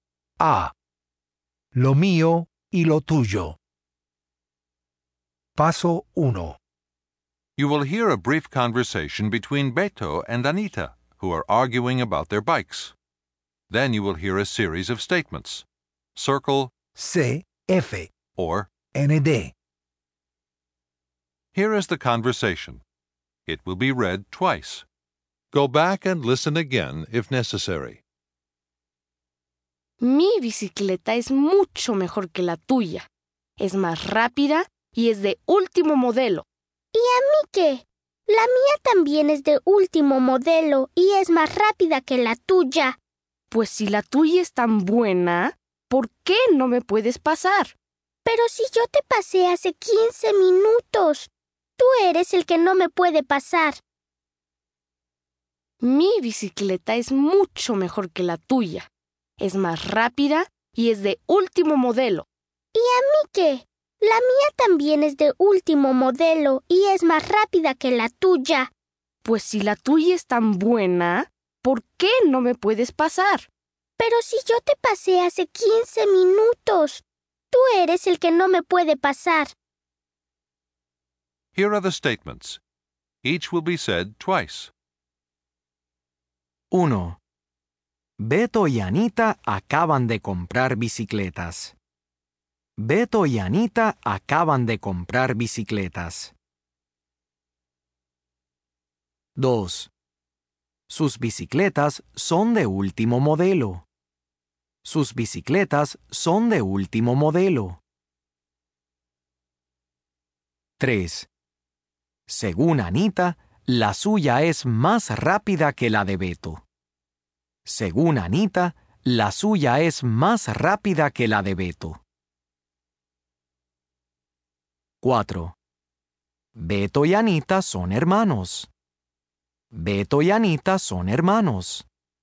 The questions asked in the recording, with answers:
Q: Beto y Anita acaban de comprar bicicletas.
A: ND

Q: Beto y Anita son hermanos.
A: ND